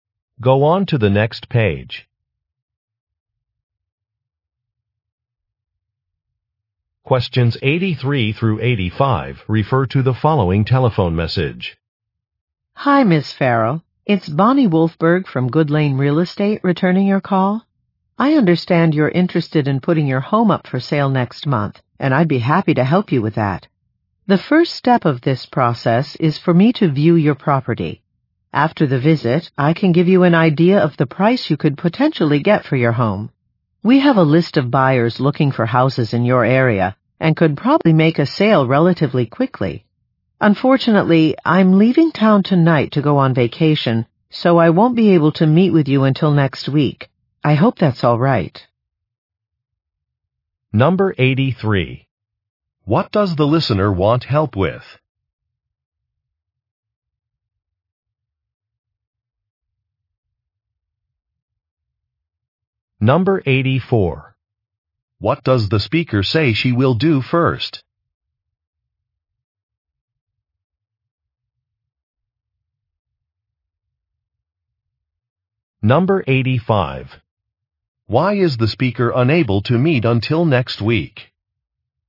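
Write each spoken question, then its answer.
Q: What does the listener want help with?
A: Selling her home

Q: What does the speaker say she will do first?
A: View the property

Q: Why is the speaker unable to meet until next week?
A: She is going on vacation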